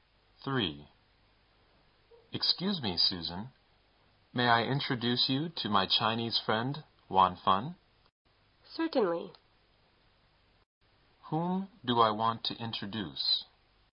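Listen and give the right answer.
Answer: My Chinese friend, Wan Fun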